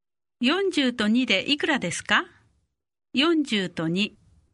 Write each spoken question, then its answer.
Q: 40と2でいくらですか40と2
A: 42